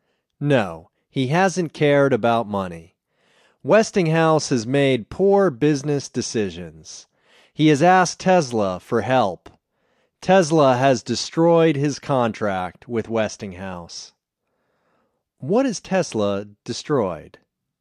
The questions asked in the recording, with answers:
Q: What has Tesla destroyed?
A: He has destroyed his contract with Westinghouse.